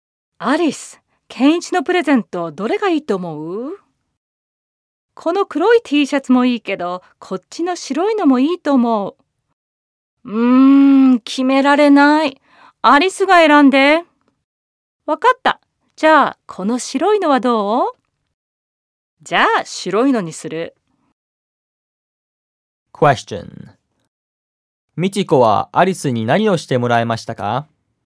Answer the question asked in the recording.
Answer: ミチコはアリスにケンイチのプレゼントを選んでもらいました。